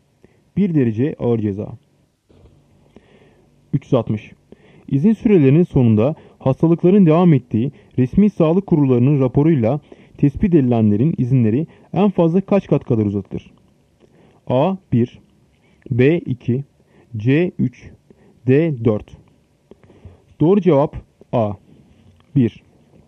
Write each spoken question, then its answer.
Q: İzin sürelerinin sonunda hastalıkların devam ettiği resmi sağlık kurullarının raporuyla tespit edilenlerin izinleri en fazla kaç kat kadar uzatılır?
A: Doğru cevap A 1.